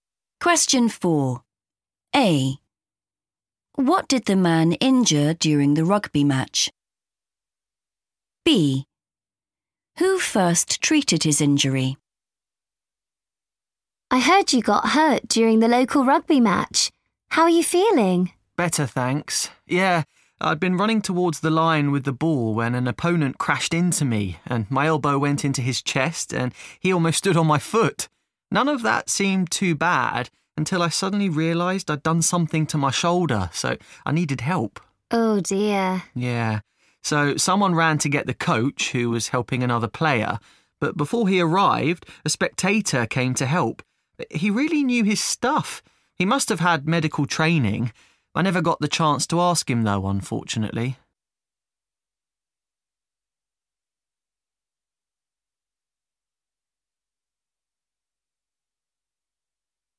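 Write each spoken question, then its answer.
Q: What did the man injure during the rugby match?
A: his shoulder

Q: Who first treated his injury?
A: a spectator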